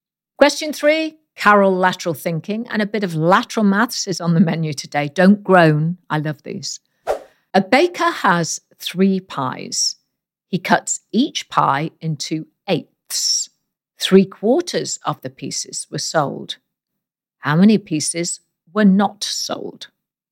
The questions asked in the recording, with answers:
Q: How many pieces were not sold?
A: And the answer is there are six unsold pieces.